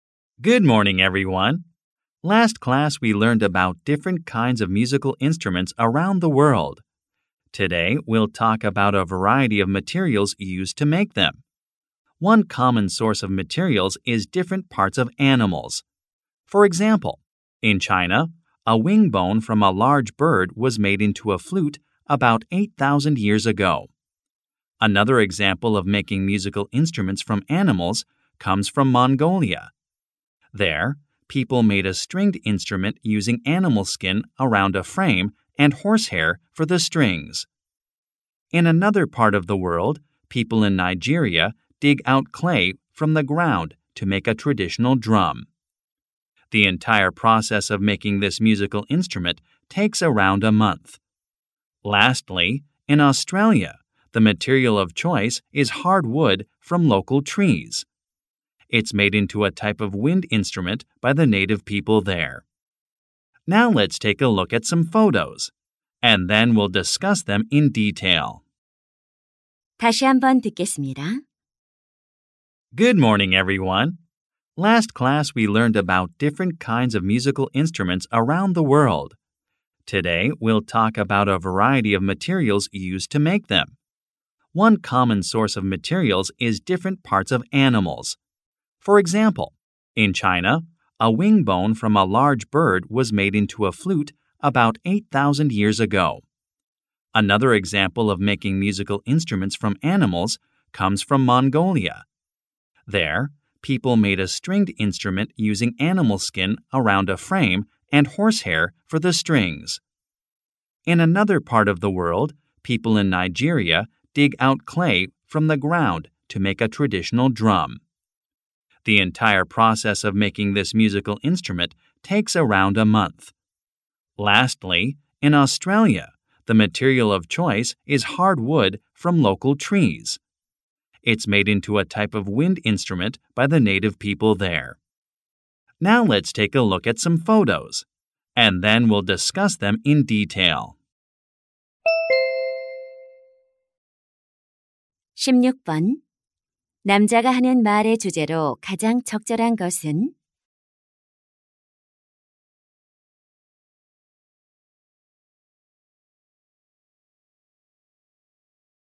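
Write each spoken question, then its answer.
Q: 남자가 하는 말의 주제로 가장 적절한 것은?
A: 악기를 만드는 데 사용되는 다양한 재료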